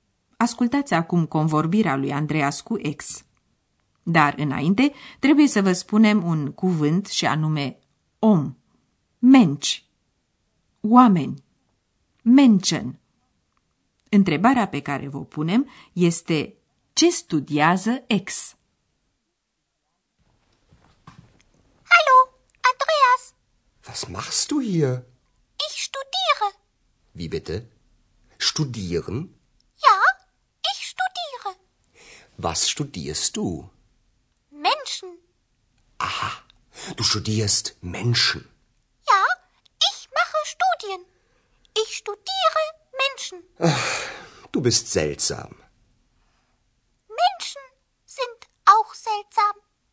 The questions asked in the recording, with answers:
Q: Întrebarea pe care vă punem este ce studiază ex?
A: Așadar, ex studiază oameni.